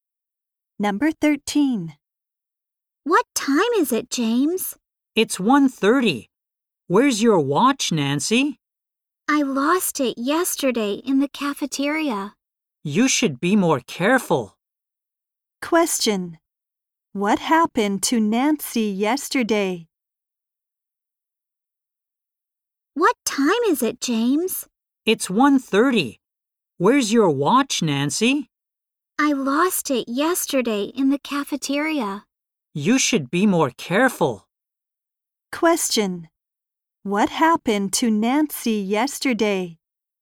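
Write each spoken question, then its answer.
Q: What happened to Nancy yesterday?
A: She lost her watch in the cafeteria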